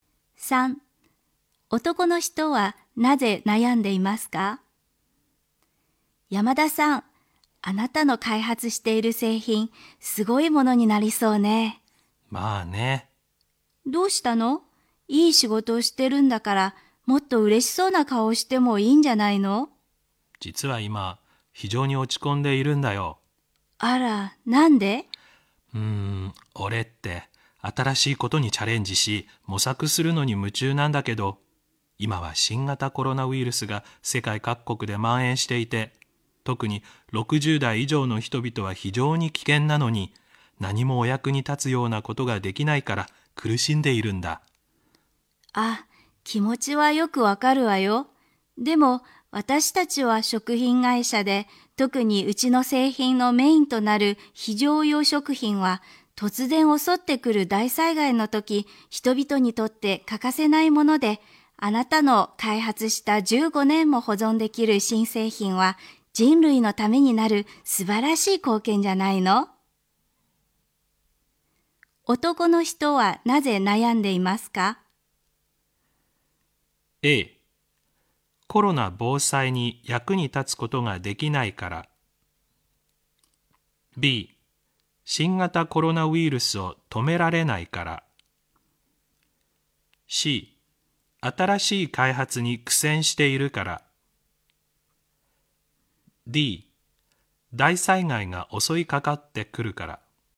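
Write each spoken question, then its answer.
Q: 男の人はなぜ悩んでいますか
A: A: コロナ防災に役に立つことができないから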